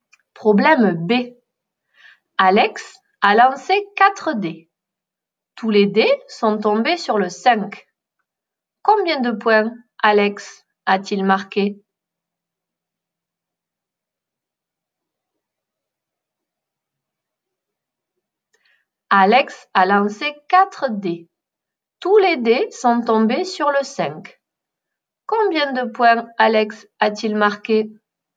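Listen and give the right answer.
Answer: 20 points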